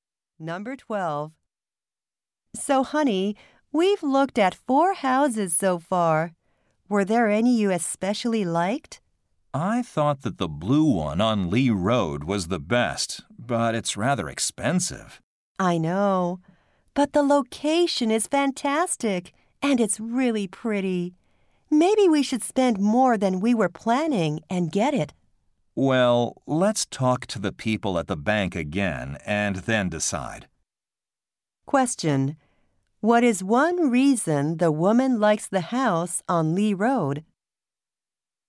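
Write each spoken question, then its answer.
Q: What is one reason the woman likes the house on Lee Road?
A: Its location is fantastic.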